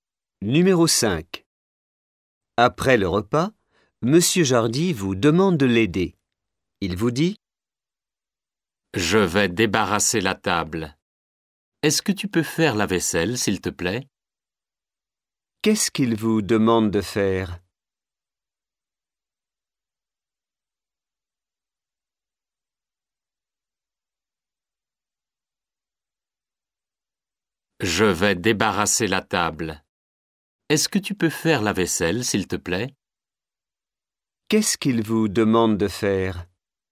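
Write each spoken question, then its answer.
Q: Qu'est-ce qu'il vous demande de faire ?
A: Faire la vaisselle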